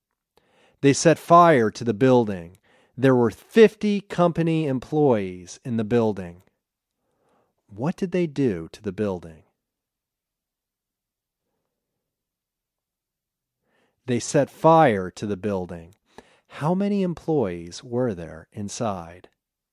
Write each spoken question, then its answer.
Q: What did they do to the building?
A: They set fire to the building.

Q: How many employees were there inside?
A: There were 50 company employees inside.